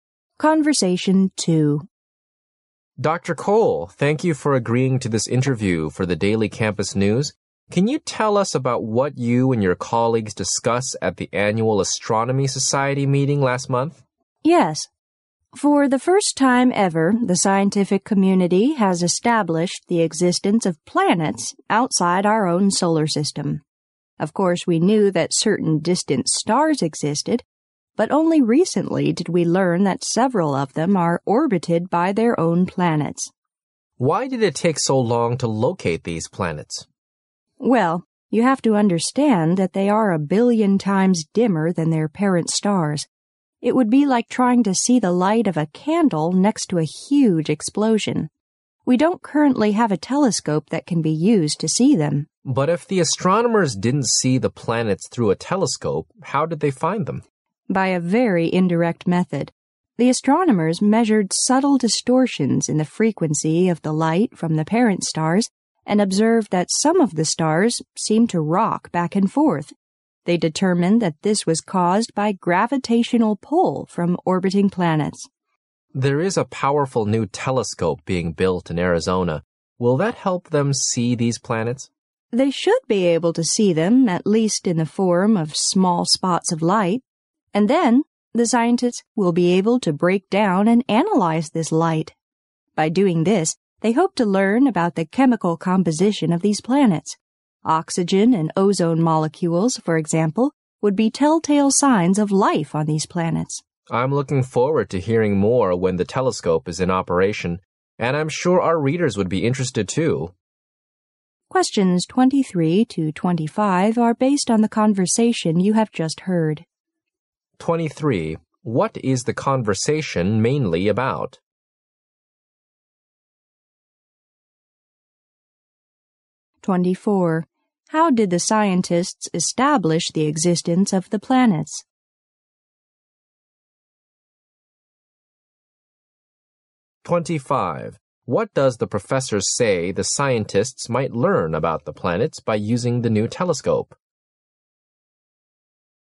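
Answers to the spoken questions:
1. The discovery of planets outside our solar system
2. Indirectly, by measuring distortions in the frequency of the light from the parent stars, which seemed to rock back and forth because of the gravitational pull of orbiting planets
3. Their chemical composition, including possible signs of life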